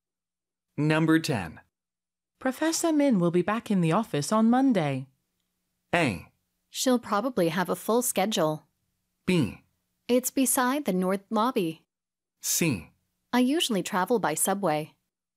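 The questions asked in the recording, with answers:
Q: Professor Min will be back in the office on Monday.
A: A: She'll probably have a full schedule.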